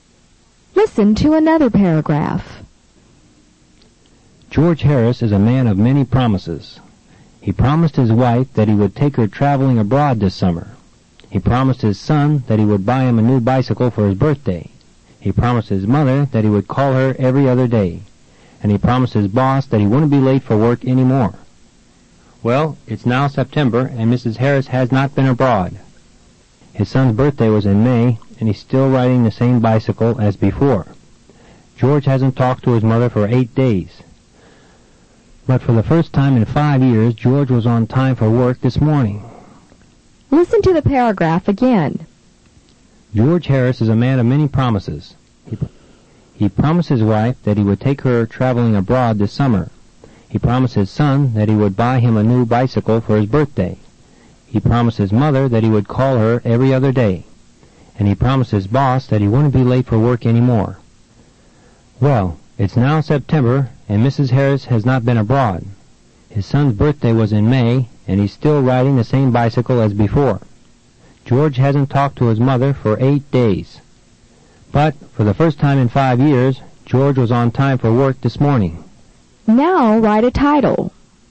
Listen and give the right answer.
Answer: Your title should be something like George's Promises.